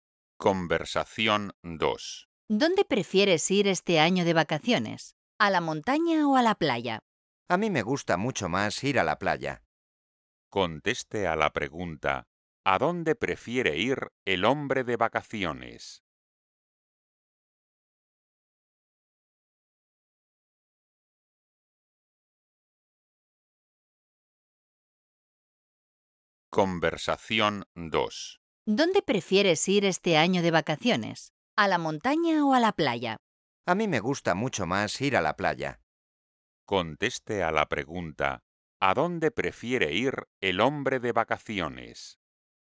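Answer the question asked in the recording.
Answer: a la playa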